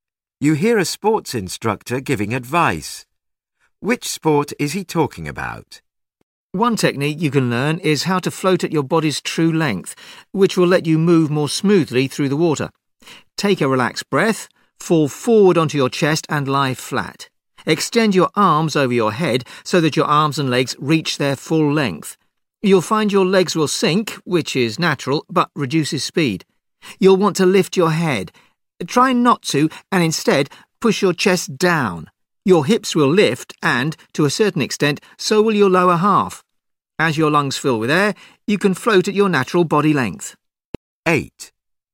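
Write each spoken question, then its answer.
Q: Which sport is he talking about?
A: Swimming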